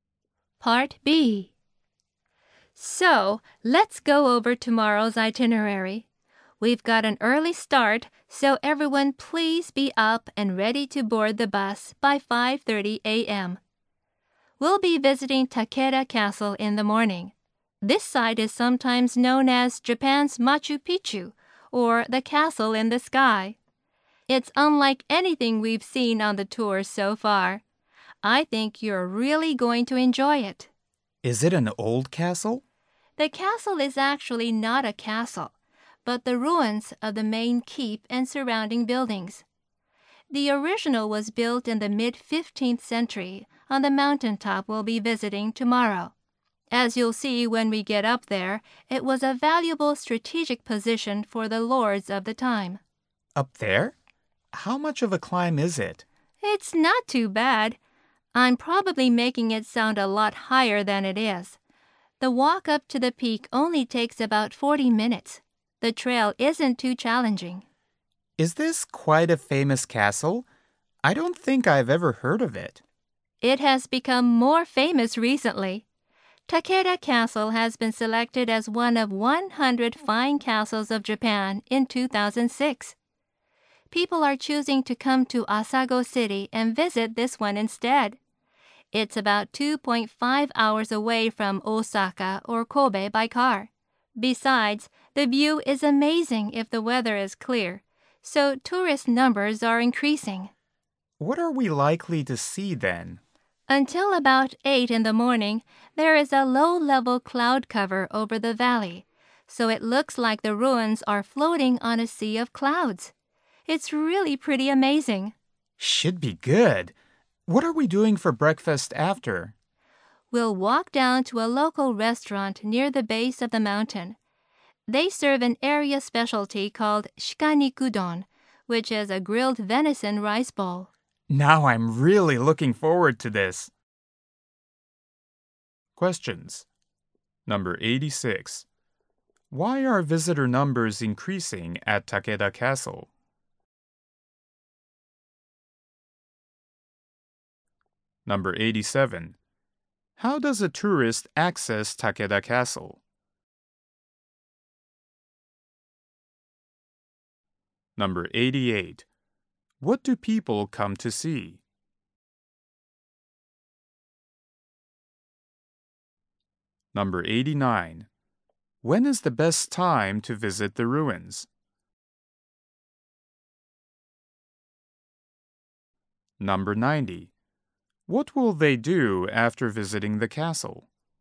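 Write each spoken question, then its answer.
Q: Why are visitor numbers increasing at Takeda Castle?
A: It was selected as one of 100 fine castles of Japan and the view is amazing

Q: What do people come to see?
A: The ruins appearing to float on a sea of clouds

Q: When is the best time to visit the ruins?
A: Early morning, before about 8 a.m.

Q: What will they do after visiting the castle?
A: Have breakfast at a local restaurant (venison rice bowl)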